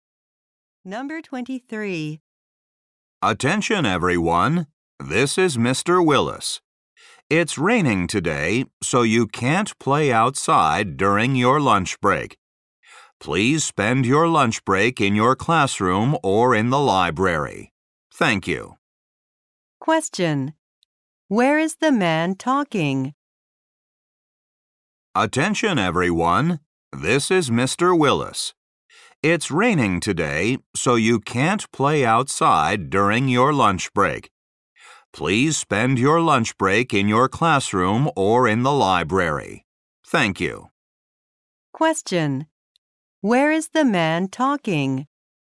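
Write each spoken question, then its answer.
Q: Where is the man talking?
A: At a school.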